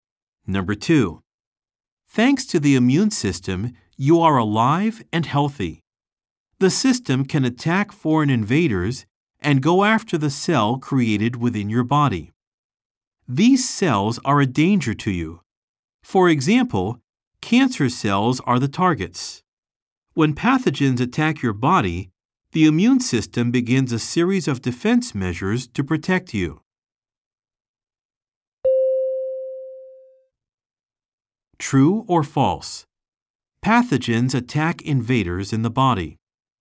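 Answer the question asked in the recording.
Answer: False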